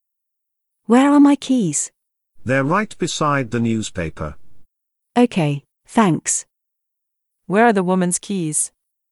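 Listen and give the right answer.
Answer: Beside the newspaper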